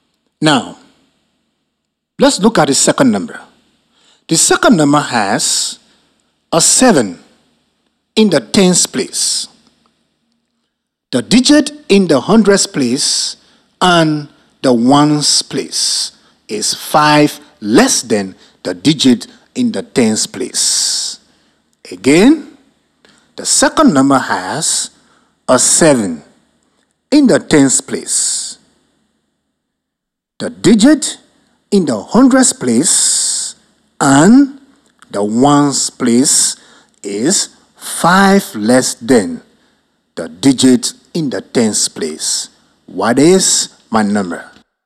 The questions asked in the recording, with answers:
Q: What is my number?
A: then the number is 272.